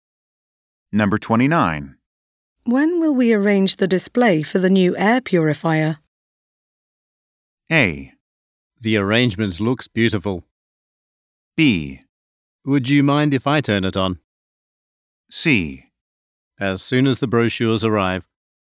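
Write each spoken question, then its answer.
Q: When will we arrange the display for the new air purifier?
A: C: As soon as the brochures arrive.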